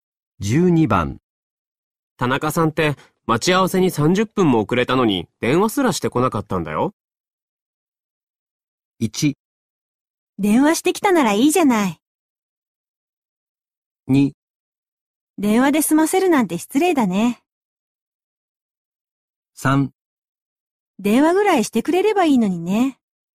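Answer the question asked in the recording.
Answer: 3: 電話ぐらいしてくれればいいのにね。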